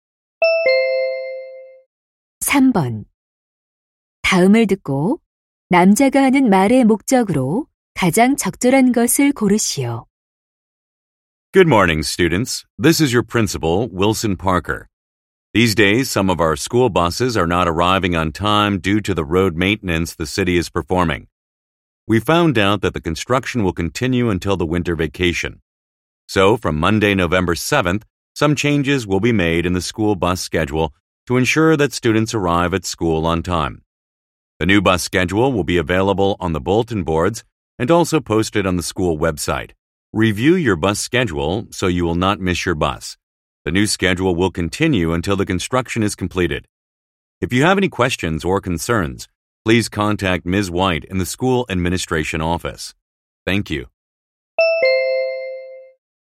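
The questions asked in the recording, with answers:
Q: 다음을 듣고 남자가 하는 말의 목적으로 가장 적절한 것을 고르시오.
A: 도로 공사로 인한 스쿨버스 시간표 변경을 안내하려고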